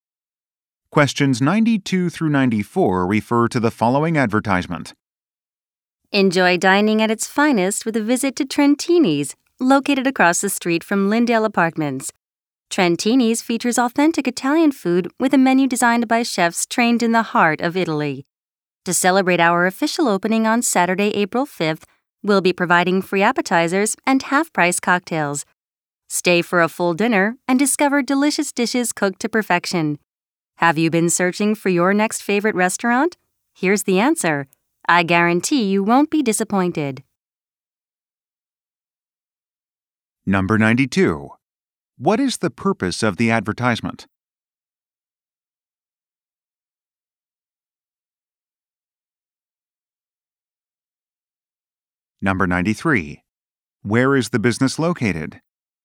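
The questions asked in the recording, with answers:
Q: What is the purpose of the advertisement?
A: To promote the opening of a restaurant

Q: Where is the business located?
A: Across the street from Lindale Apartments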